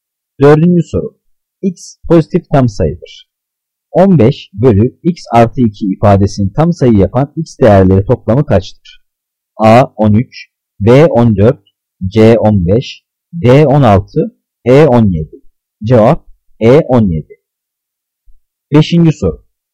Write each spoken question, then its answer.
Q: 15 bölü x artı 2 ifadesini tam sayı yapan x değerleri toplamı kaçtır?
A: Cevap E. 17.